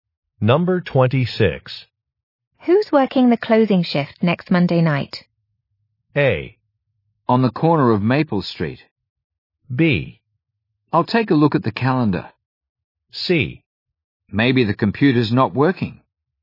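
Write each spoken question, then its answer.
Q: Who's working the closing shift next Monday night?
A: B: I'll take a look at the calendar.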